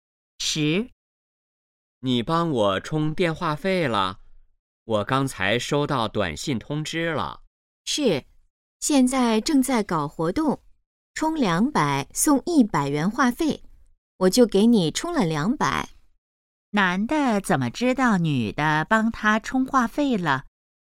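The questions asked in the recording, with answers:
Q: 男的怎么知道女的帮他充话费了?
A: 收到了短信通知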